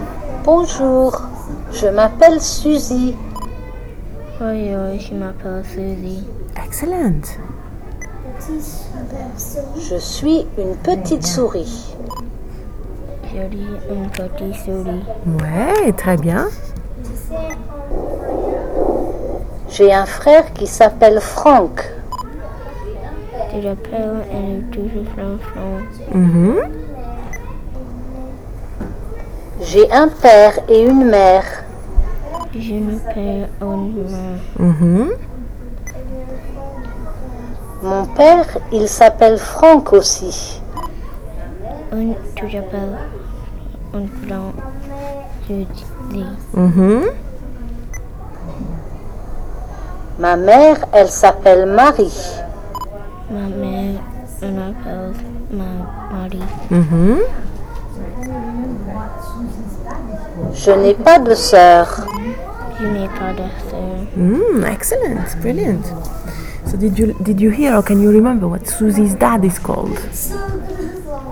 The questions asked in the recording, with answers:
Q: So did you hear or can you remember what Susie's dad is called?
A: Frank.